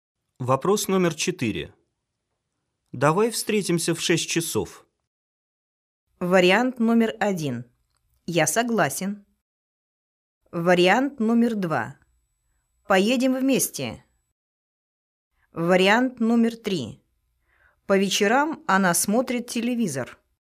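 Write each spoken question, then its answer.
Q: Давай встретимся в 6 часов.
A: 1: Я согласен.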